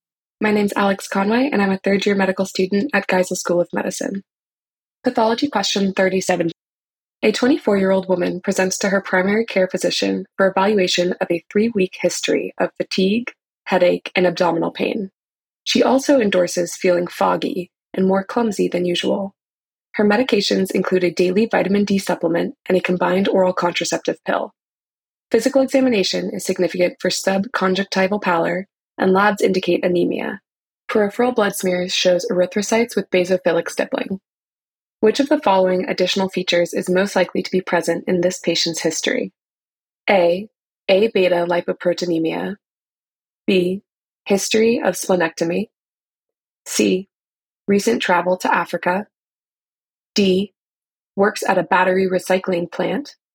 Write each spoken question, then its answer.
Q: Which of the following additional features is most likely to be present in this patient's history?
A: The correct answer is D.